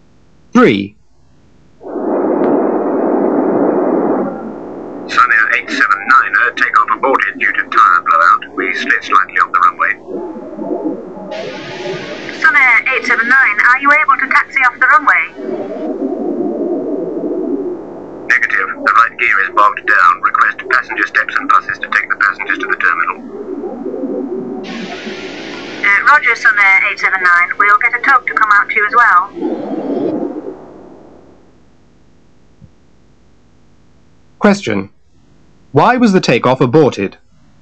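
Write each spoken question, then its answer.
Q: Why was the takeoff aborted?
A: Tyre blowout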